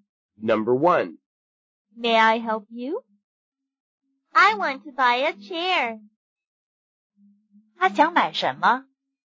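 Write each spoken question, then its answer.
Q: 他想买什么?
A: 椅子 (a chair)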